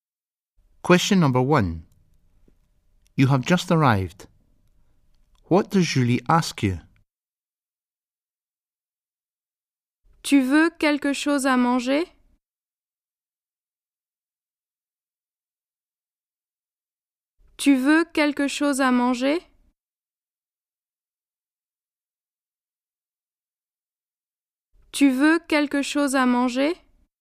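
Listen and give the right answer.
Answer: If you want something to eat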